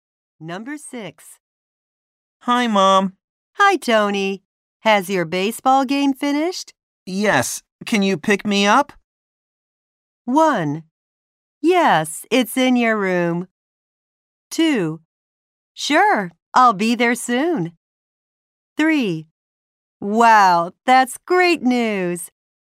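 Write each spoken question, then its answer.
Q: Yes. Can you pick me up?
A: 2: Sure, I'll be there soon.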